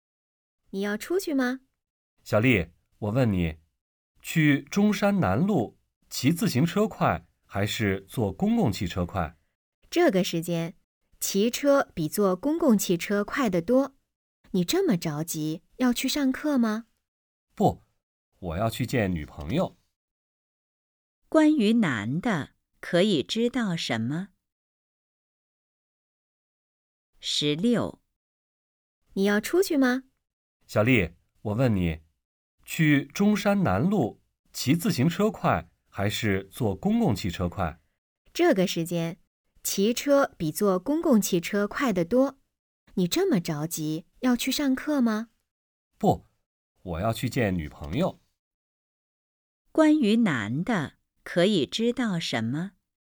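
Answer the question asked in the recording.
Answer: 他要去见女朋友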